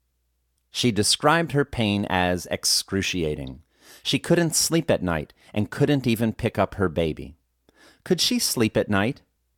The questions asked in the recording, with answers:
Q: Could she sleep at night?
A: No, she couldn't sleep at night.